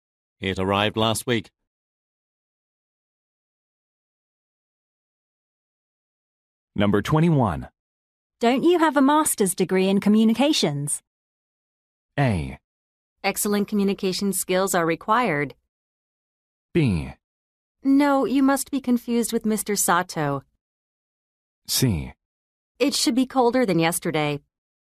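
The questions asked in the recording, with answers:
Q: Don't you have a master's degree in communications?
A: B: No, you must be confused with Mr. Sato.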